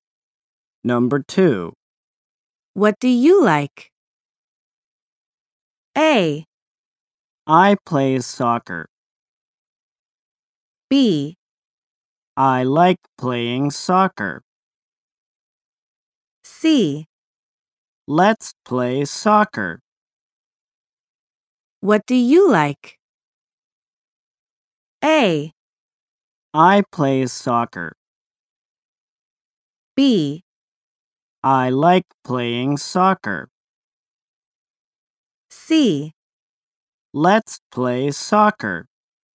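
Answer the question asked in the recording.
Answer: B: I like playing soccer.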